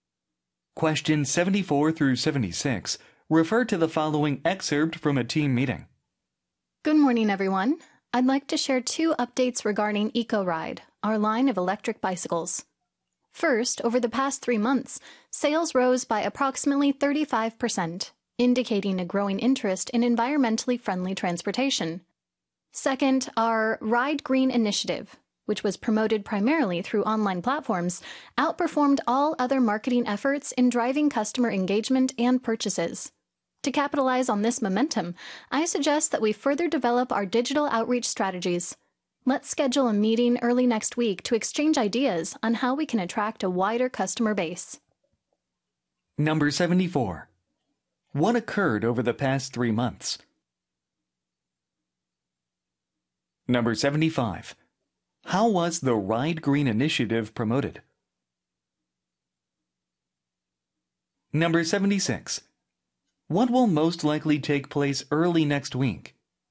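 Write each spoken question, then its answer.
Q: What occurred over the past 3 months?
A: Sales rose by about 35%

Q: How was the Ride Green initiative promoted?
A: Mainly through online platforms

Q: What will most likely take place early next week?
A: A meeting to exchange ideas on attracting more customers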